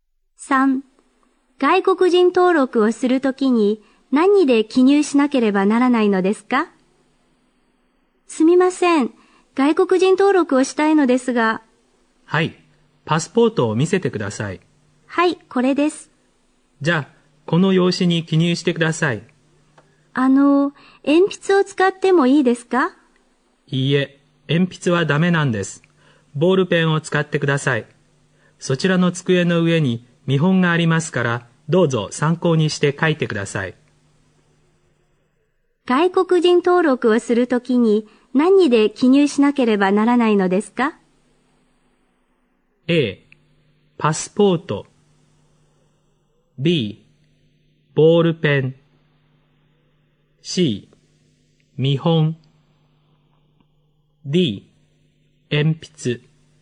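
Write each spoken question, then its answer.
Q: 外国人登録をするときに何で記入しなければならないのですか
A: B: ボールペン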